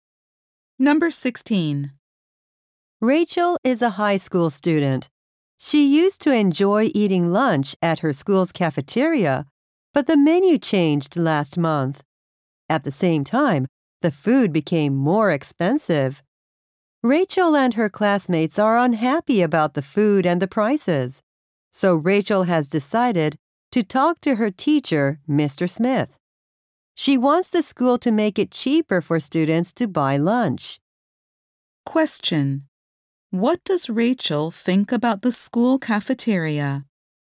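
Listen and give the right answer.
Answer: The lunches are too expensive and the food has got worse.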